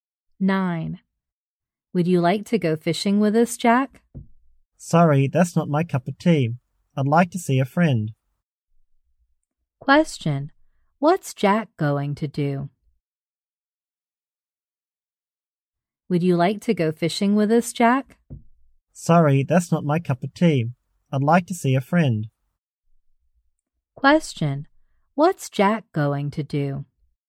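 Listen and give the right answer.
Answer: See a friend.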